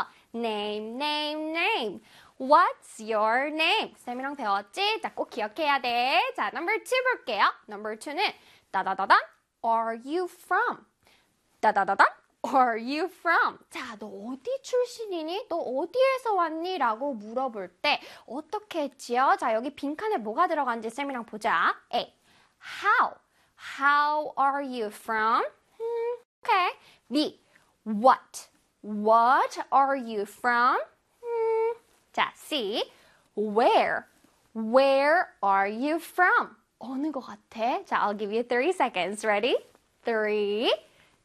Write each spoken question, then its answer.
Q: Number two는 따다다다 Are you from?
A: 맞습니다. 정답은 C. Where였어요.